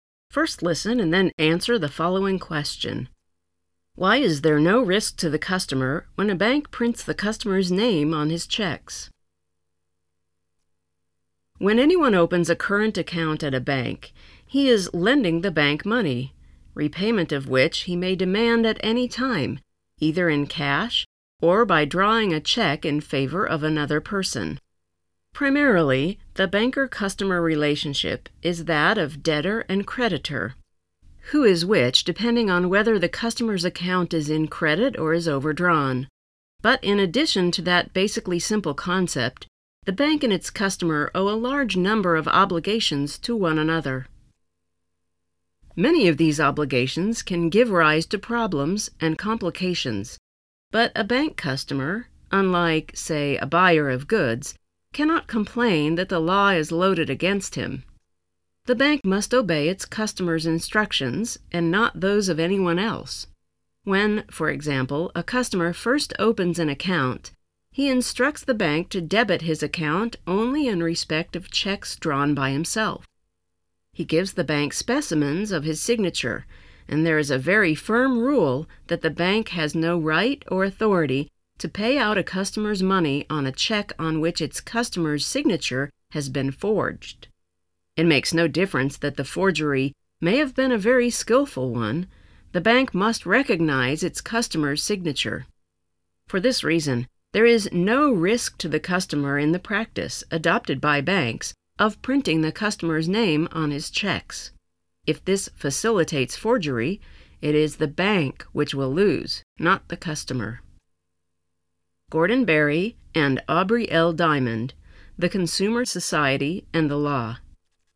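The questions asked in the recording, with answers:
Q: Why is there no risk to the customer when a bank prints the customer's name on his checks?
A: Because the bank must recognize its customer's signature and, if forgery happens, the bank loses, not the customer.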